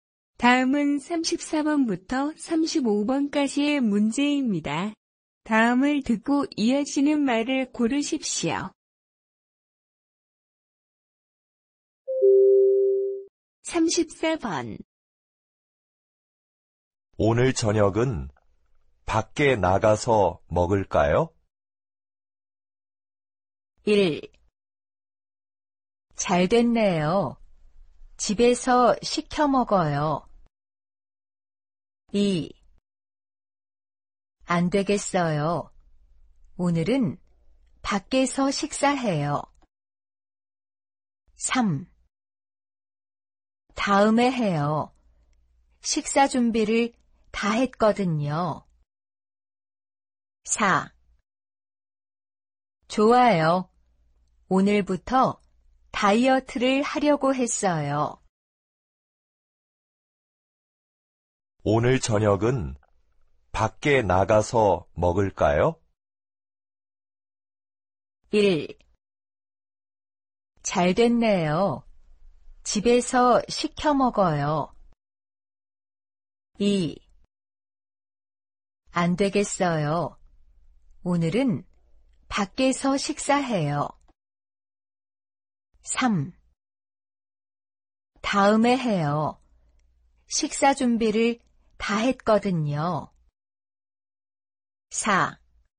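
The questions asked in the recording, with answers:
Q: 오늘 저녁은 밖에 나가서 먹을까요?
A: 3: 다음에 해요. 식사 준비를 다 했거든요.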